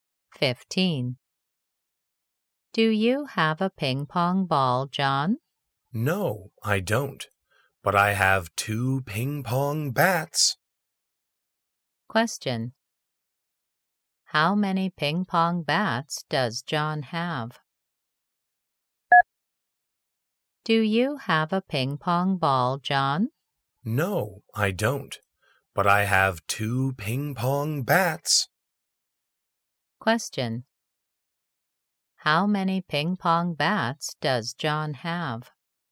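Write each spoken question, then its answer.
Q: How many ping pong bats does John have?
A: two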